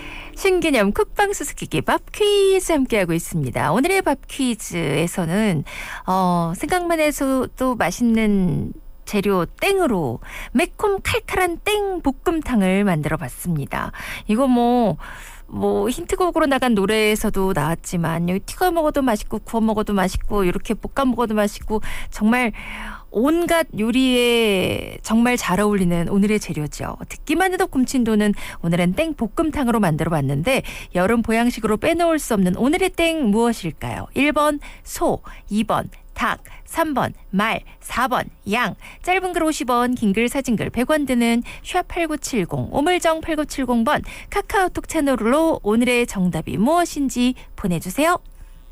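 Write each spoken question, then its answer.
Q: 여름 보양식으로 빼놓을 수 없는 오늘의 땡 무엇일까요?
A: 2: 닭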